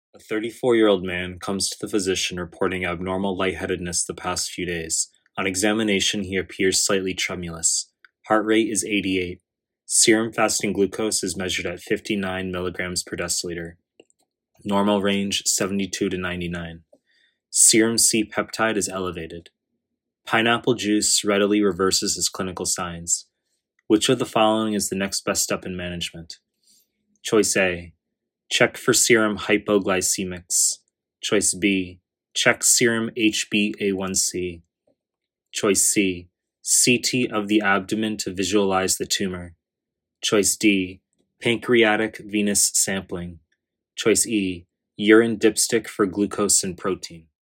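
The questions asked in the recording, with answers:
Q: Which of the following is the next best step in management?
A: A: Check for serum hypoglycemics.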